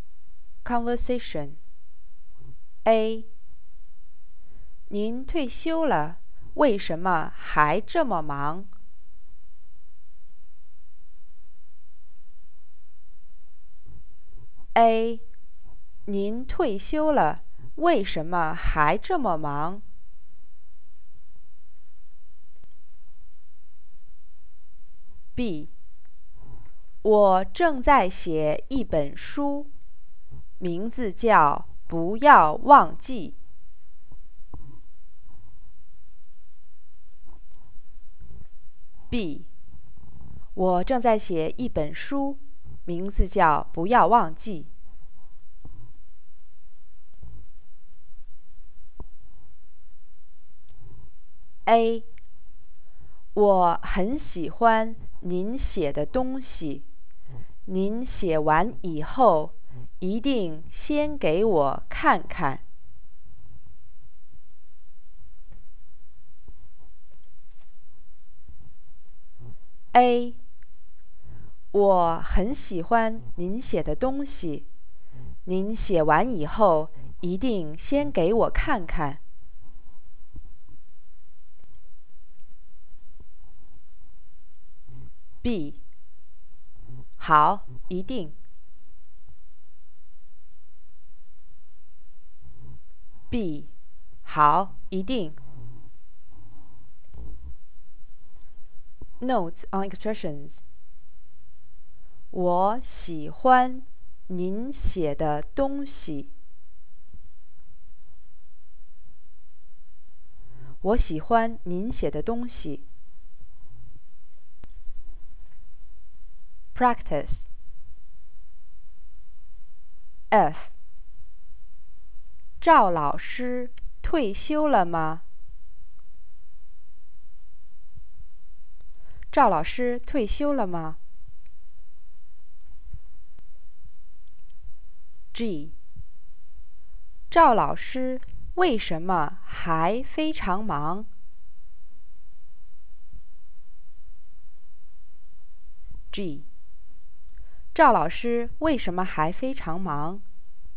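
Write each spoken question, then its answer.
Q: 赵老师退休了吗?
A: 退休了

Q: 赵老师为什么还非常忙?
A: 因为她正在写一本书,名字叫《不要忘记》。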